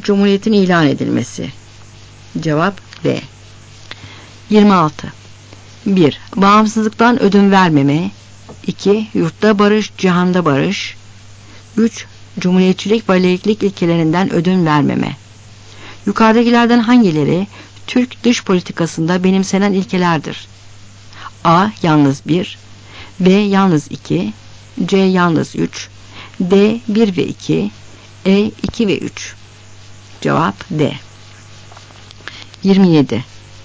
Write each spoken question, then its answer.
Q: Yukarıdakilerden hangileri Türk dış politikasında benimsenen ilkelerdir?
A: Cevap D.